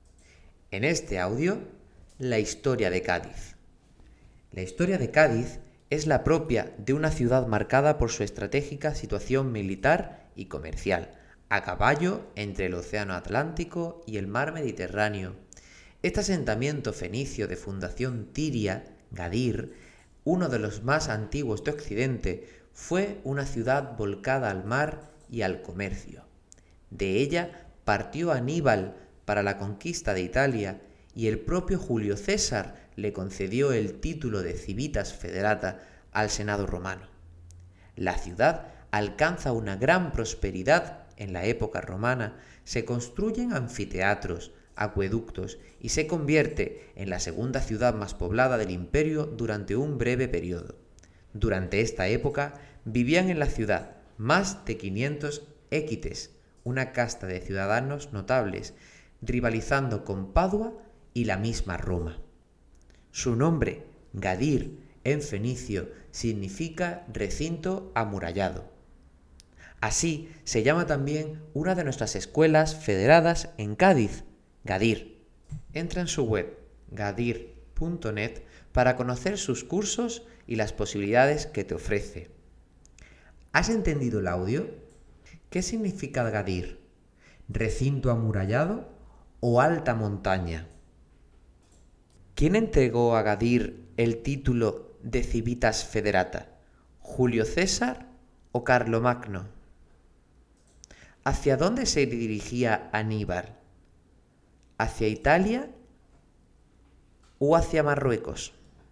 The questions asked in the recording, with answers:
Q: ¿Qué significa Gadir?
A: el nombre de la ciudad significaba recinto amurallado.

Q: ¿Quién entregó a Gadir el título de Civitas Federata?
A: Fue Julio César el que concedió el título de Civitas Federata

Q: ¿Hacia dónde se dirigía Aníbal?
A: Aníbal se dirigía a la conquista de Italia.